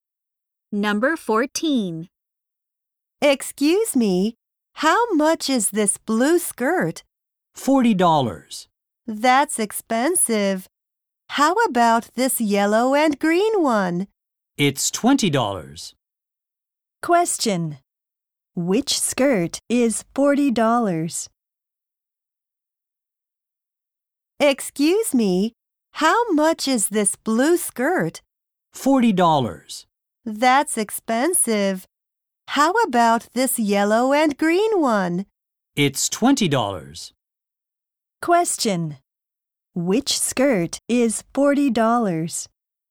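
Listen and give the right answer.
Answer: The blue one.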